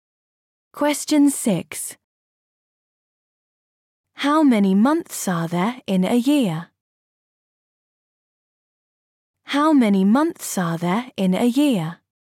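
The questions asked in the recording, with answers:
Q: How many months are there in a year?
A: 12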